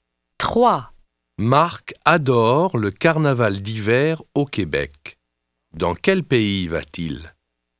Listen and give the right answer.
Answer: Il va au Canada.